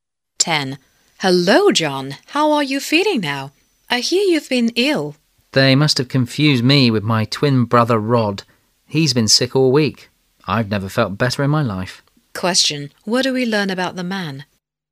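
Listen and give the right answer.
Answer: He isn't ill; his twin brother is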